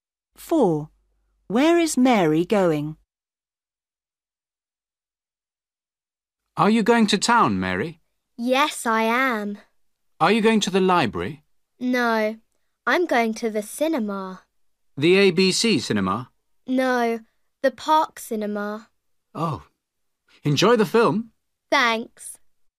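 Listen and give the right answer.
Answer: to the park cinema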